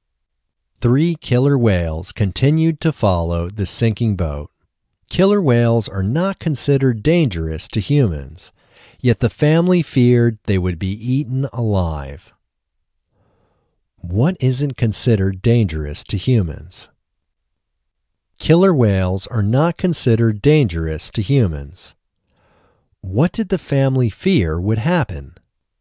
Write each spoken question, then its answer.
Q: What did the family fear would happen?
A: The family feared they would be eaten alive.